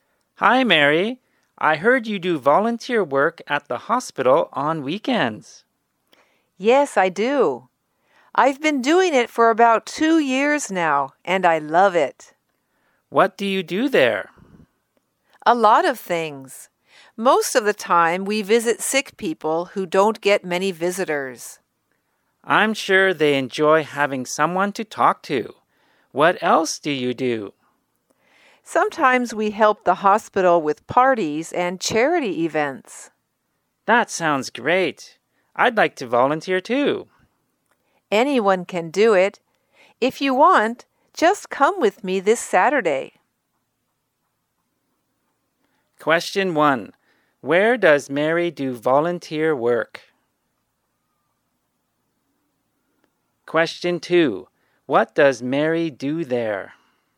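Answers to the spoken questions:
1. At the hospital
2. She mostly visits sick people who don't get many visitors, and sometimes helps with parties and charity events.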